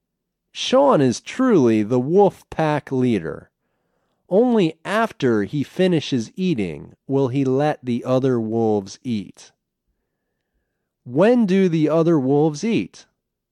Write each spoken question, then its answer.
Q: When do the other wolves eat?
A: The other wolves eat after Sean is finished eating.